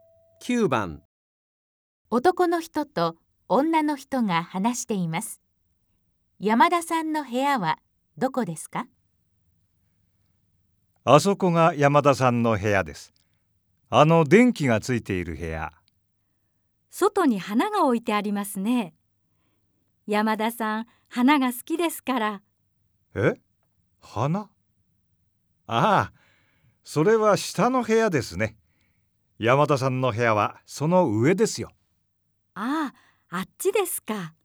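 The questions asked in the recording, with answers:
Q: 山田さんの部屋はどこですか?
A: 電気がついている部屋で、花が置いてある部屋の上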